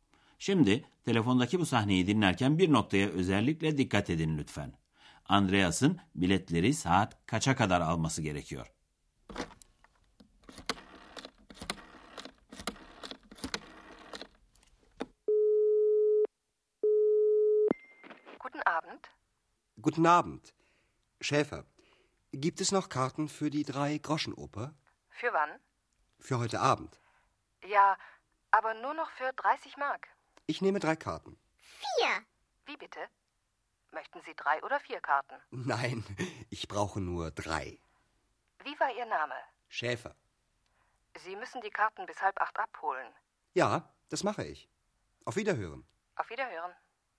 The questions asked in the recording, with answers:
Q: Andreas'ın biletleri saat kaça kadar alması gerekiyor?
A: Andreas'ın biletleri saat yedi buçuğa kadar alması gerekiyor.